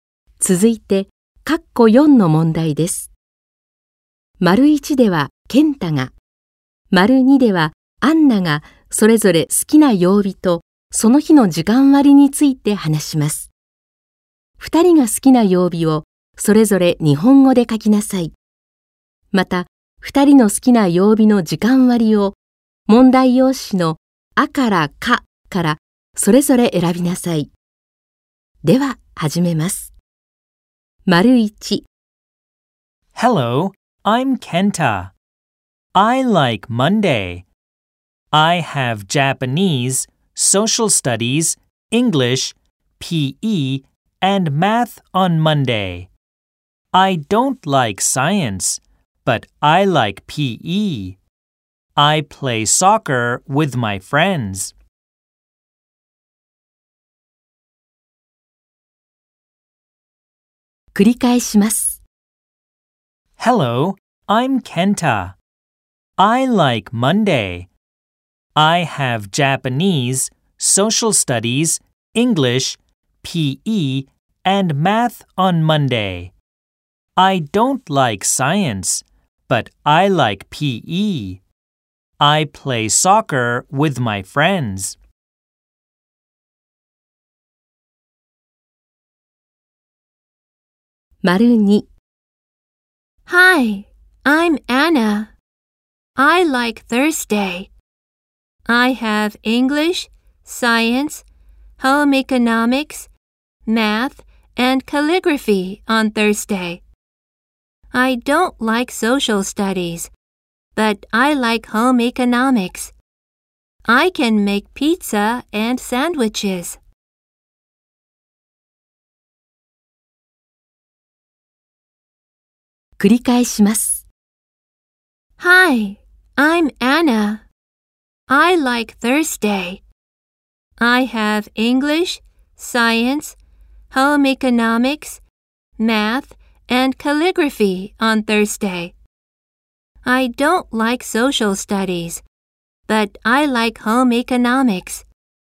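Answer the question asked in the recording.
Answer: ケンタ:月曜日、アンナ:木曜日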